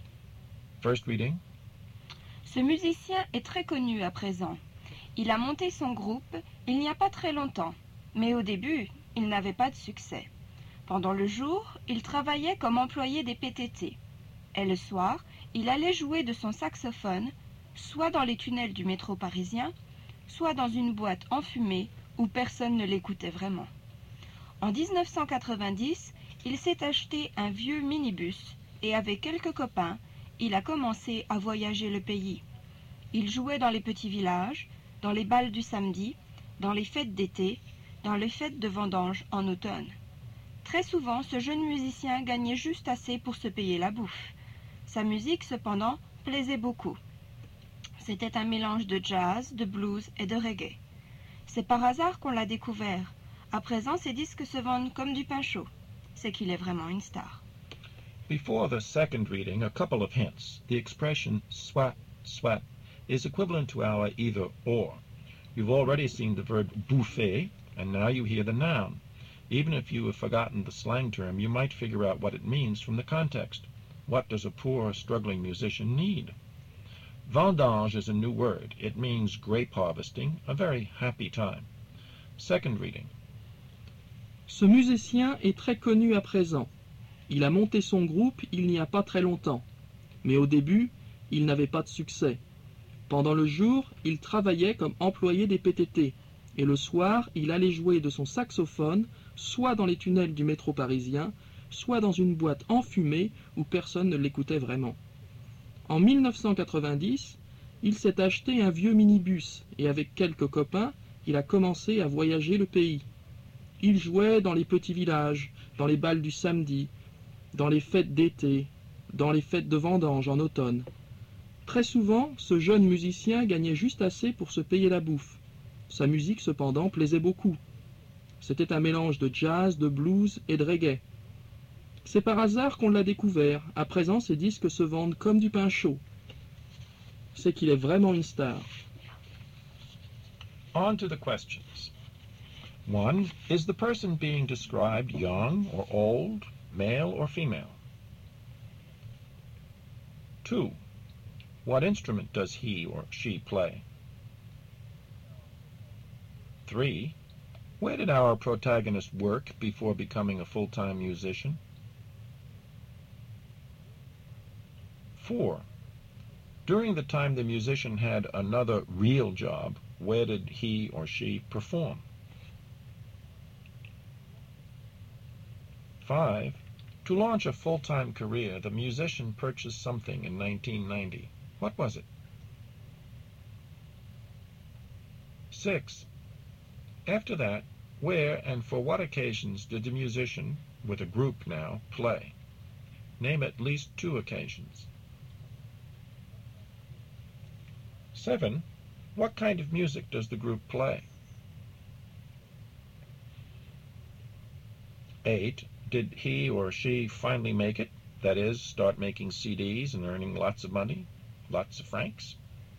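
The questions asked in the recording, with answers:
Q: Is the person being described young or old, male or female?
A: Young, male

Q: What instrument does he or she play?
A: Saxophone

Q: Where did our protagonist work before becoming a full-time musician?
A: At the PTT (post office)

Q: During the time the musician had another real job, where did he or she perform?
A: In the Paris metro tunnels or in a smoky nightclub

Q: To launch a full-time career, the musician purchased something in 1990.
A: An old minibus

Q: After that, where and for what occasions did the musician, with a group now, play?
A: In small villages, at Saturday dances, summer festivals, and grape-harvest festivals

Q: What kind of music does the group play?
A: A mix of jazz, blues and reggae

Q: Did he or she finally make it, that is, start making CDs and earning lots of money, lots of francs?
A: Yes, his records sell like hotcakes; he is a star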